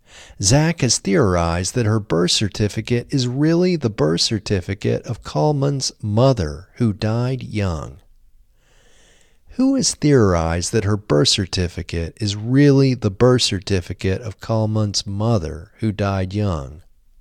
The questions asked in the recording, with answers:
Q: Who has theorized that her birth certificate is really the birth certificate of Kalman's mother, who died young?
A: Zak has theorized that her birth certificate is really the birth certificate of Kalman's mother, who died young.